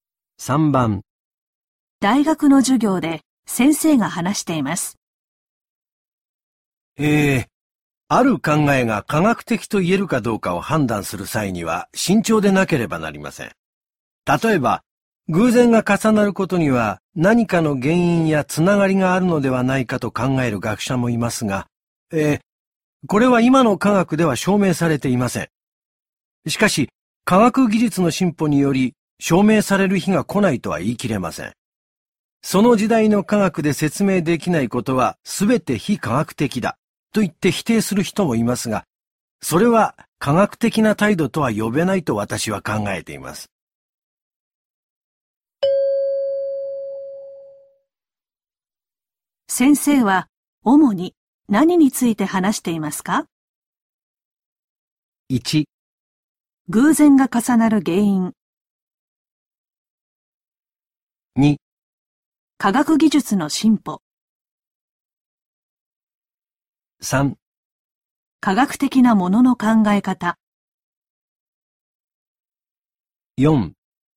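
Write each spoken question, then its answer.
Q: 先生は主に何について話していますか?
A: 3: 科学的なものの考え方。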